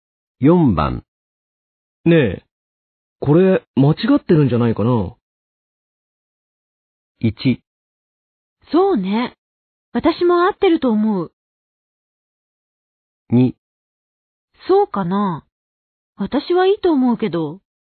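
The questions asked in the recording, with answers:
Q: ねえ、これ間違ってるんじゃないかな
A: 2: そうかな。私はいいと思うけど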